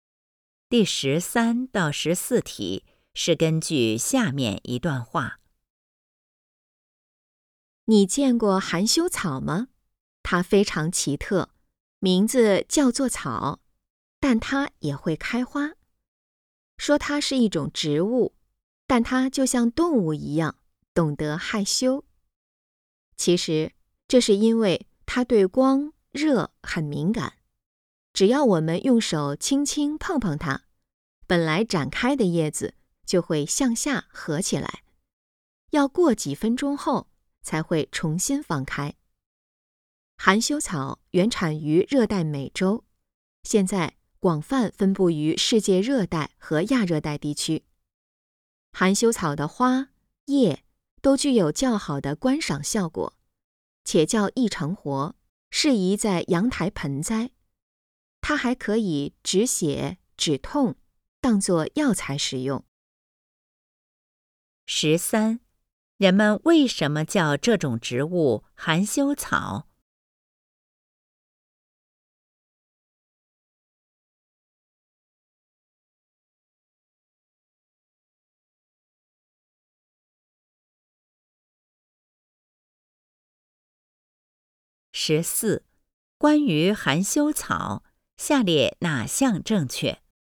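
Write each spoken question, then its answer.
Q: 人们为什么叫这种植物含羞草?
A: 一碰叶子就合起来,像害羞一样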